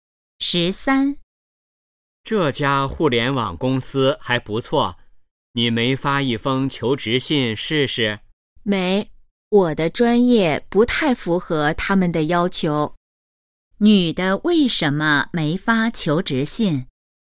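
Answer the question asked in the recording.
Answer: 专业不太符合要求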